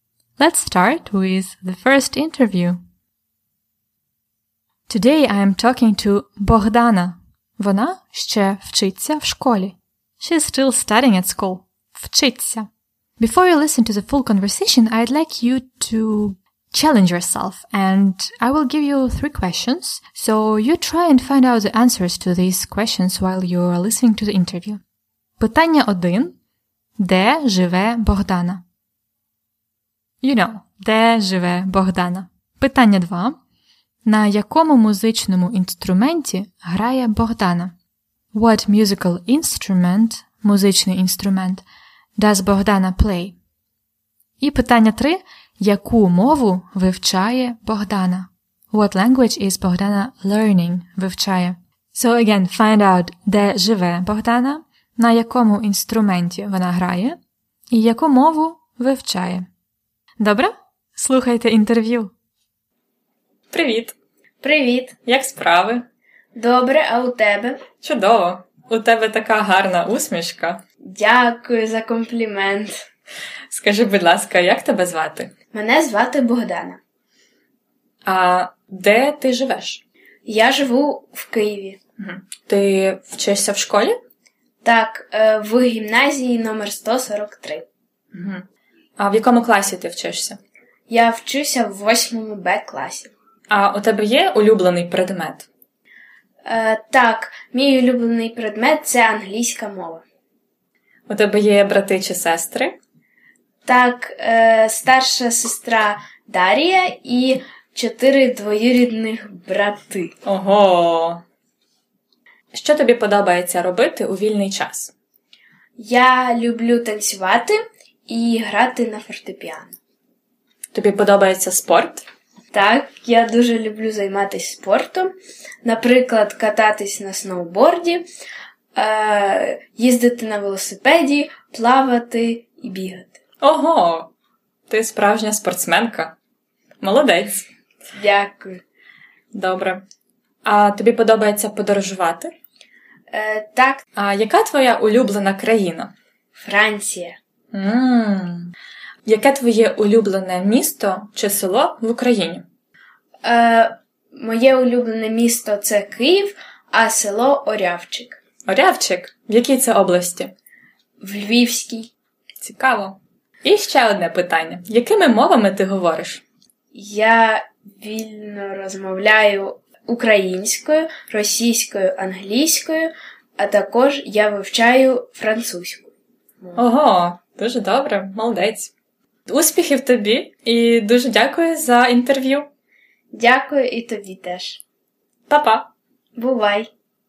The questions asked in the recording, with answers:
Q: Де живе Богдана?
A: Вона живе в Києві. В Києві.

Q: На якому музичному інструменті грає Богдана?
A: Вона грає на фортепіано.

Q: Яку мову вивчає Богдана?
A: Богдана вивчає французьку мову.